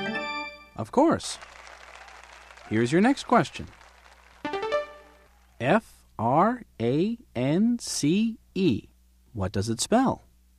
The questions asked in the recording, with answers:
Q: F-R-A-N-C-E. What does it spell?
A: It spells France.